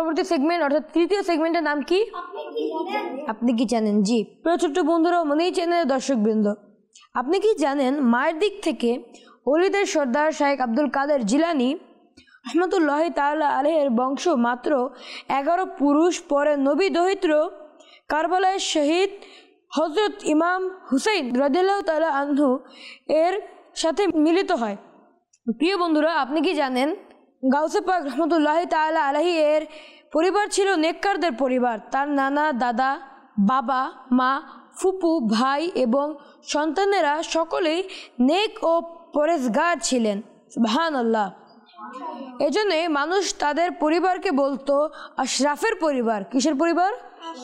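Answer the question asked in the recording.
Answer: আশরাফের পরিবার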